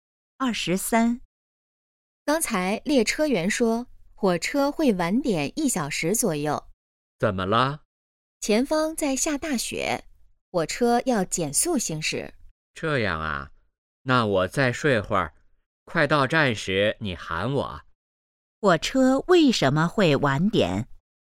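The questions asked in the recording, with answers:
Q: 火车为什么会晚点?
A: 前方下大雪,要减速行驶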